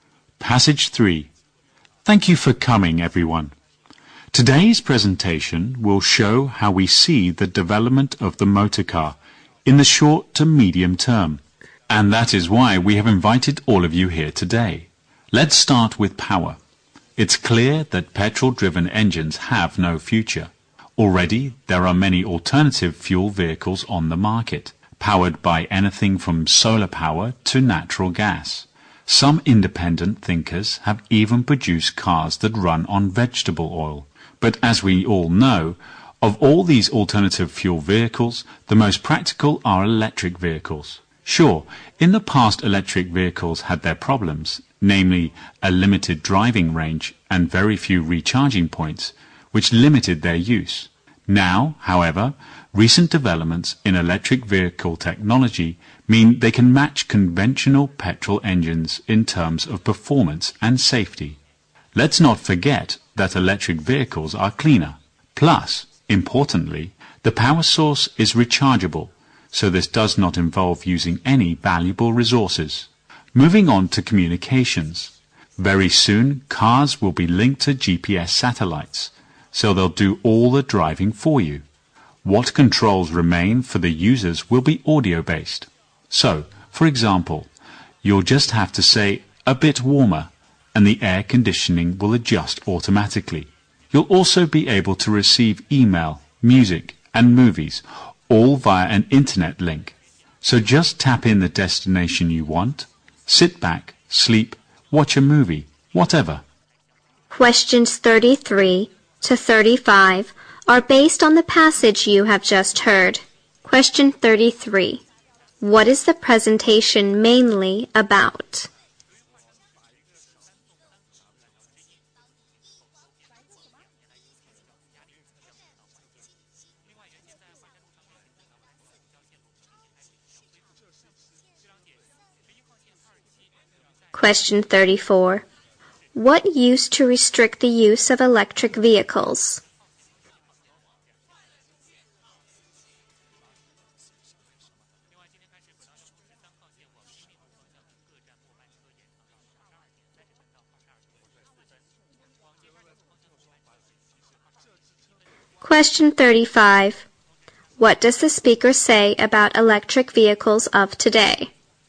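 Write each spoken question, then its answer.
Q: What is the presentation mainly about?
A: How the motor car will develop in the short to medium term

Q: What used to restrict the use of electric vehicles?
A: A limited driving range and very few recharging points

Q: What does the speaker say about electric vehicles of today?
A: They can match petrol cars in performance and safety, and they are cleaner.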